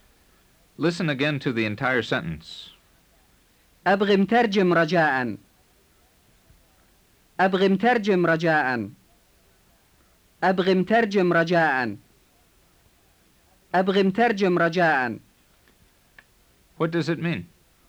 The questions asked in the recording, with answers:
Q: What does it mean?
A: It means, I want an interpreter, please.